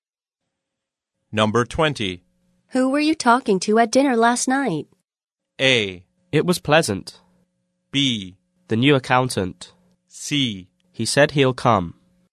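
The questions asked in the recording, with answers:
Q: Who were you talking to at dinner last night?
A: B: The new accountant.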